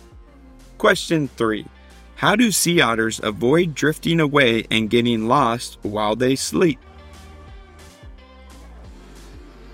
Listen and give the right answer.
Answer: They hold hands.